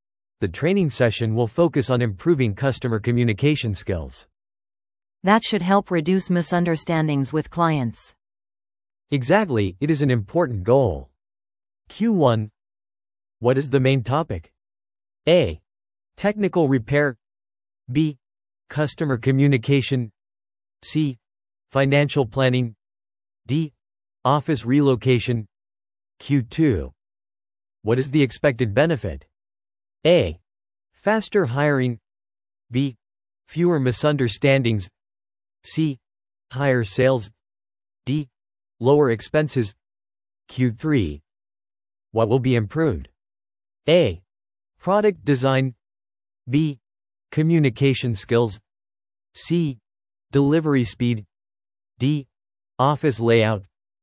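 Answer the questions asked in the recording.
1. B: Customer communication.
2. B: Fewer misunderstandings.
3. B: Communication skills.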